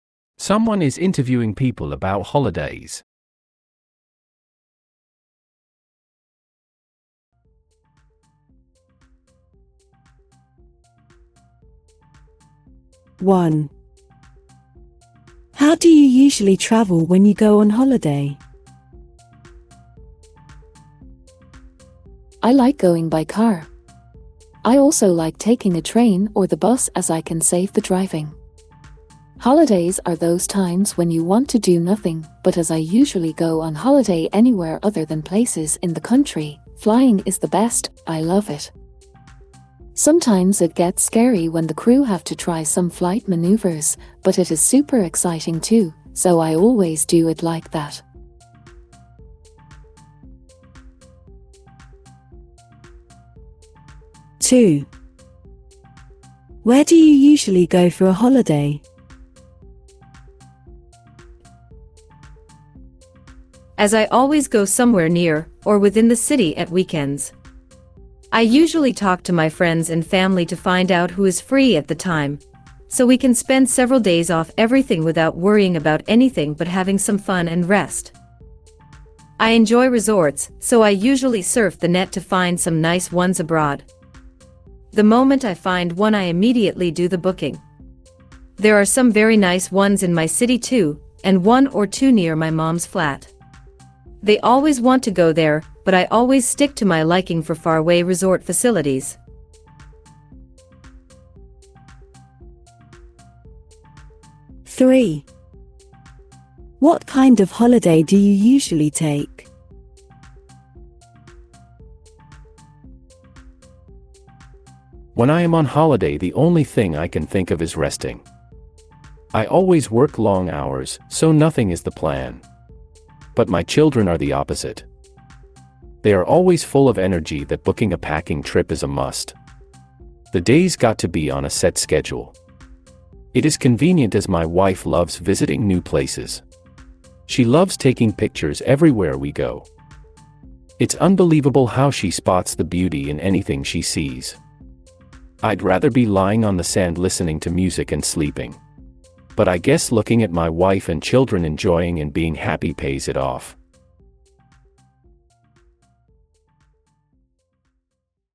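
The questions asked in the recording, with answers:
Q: How do you usually travel when you go on holiday?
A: By plane (flying)

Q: Where do you usually go for a holiday?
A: To resorts abroad

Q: What kind of holiday do you usually take?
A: A package trip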